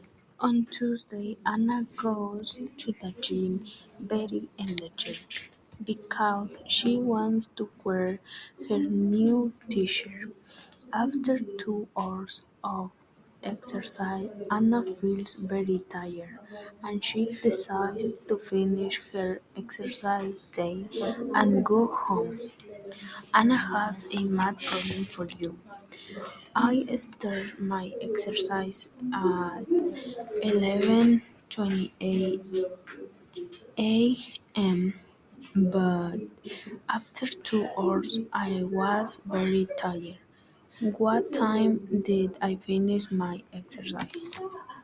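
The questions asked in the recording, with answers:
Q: What time did I finish my exercise?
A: 1:28 p.m.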